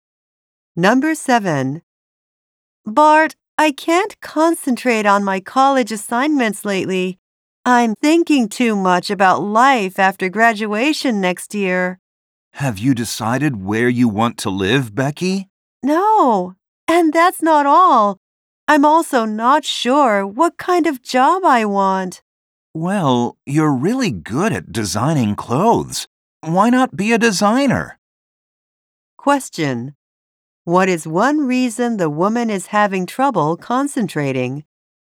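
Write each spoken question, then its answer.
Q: What is one reason the woman is having trouble concentrating?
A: She is not sure what kind of job she wants (or where to live) after graduation.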